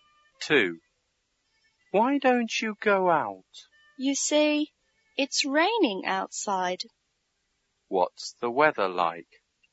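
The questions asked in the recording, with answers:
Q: What's the weather like?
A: It's raining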